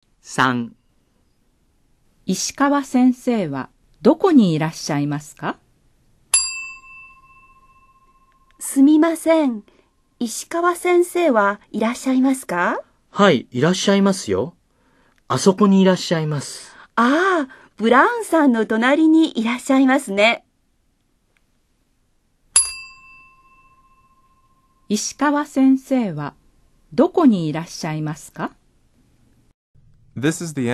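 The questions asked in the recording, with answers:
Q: 石川先生はどこにいらっしゃいますか?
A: ブラウンさんの隣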